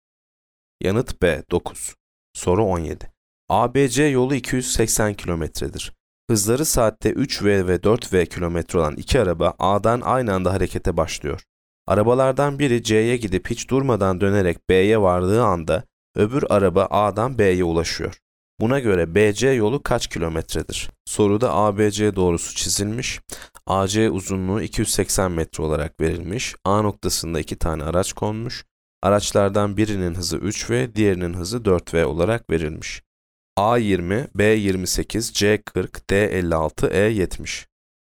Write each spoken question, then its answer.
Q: Buna göre BC yolu kaç kilometredir?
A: Yanıt C 40.